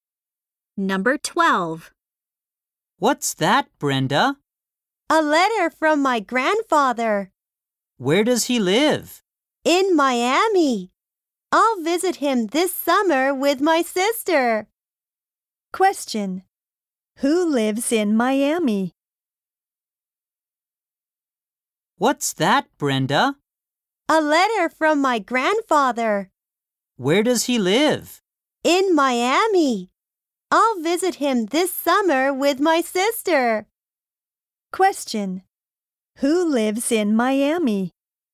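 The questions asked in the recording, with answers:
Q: Who lives in Miami?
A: Brenda's grandfather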